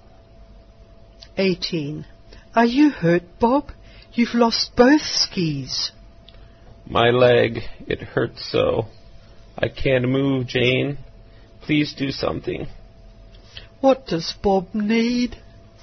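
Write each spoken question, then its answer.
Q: What does Bob need?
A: Help, because his leg is hurt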